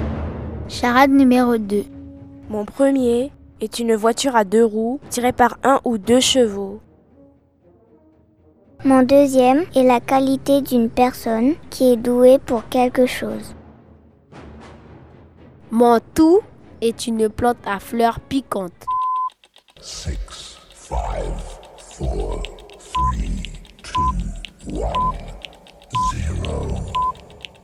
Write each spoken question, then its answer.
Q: Mon tout est une plante à fleurs piquantes.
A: un chardon.